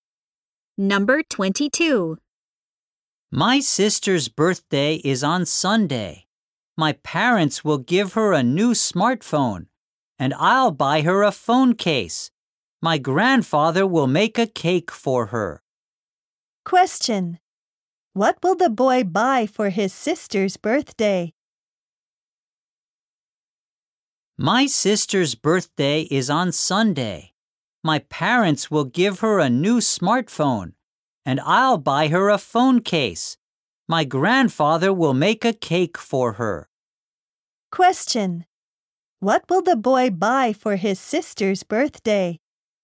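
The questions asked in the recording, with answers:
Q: What will the boy buy for his sister's birthday?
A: A phone case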